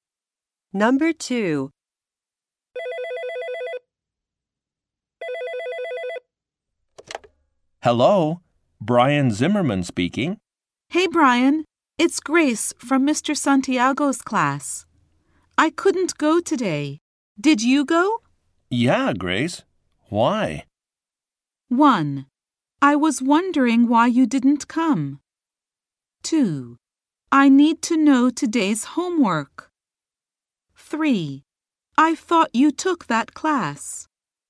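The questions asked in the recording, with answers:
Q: Yeah, Grace. Why?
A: 2: I need to know today's homework.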